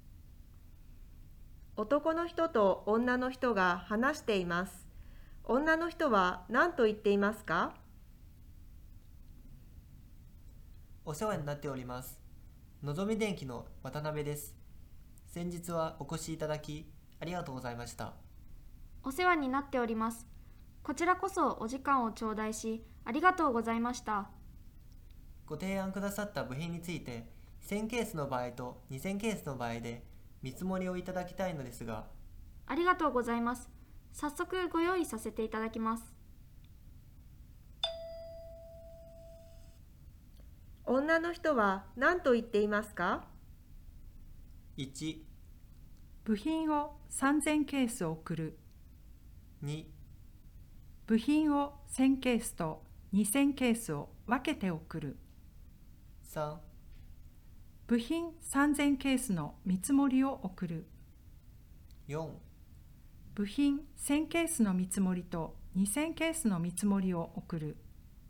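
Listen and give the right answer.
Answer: 4: 部品1000ケースの見積もりと2000ケースの見積もりを送る。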